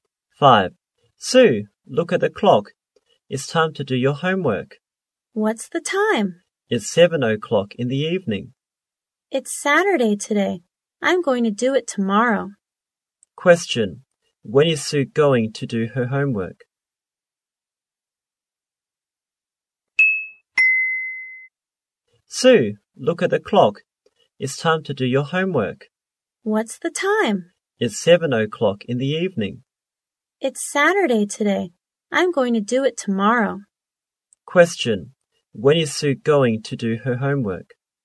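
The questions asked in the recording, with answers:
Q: Question. When is Sue going to do her homework?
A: Tomorrow (Sunday)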